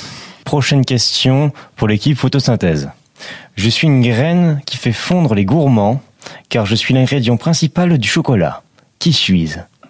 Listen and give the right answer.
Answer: Le cacao.